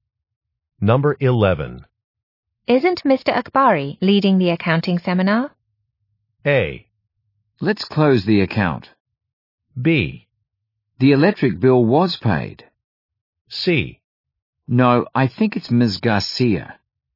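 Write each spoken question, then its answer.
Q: Isn't Mr. Akbari leading the accounting seminar?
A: C: No, I think it's Ms. Garcia.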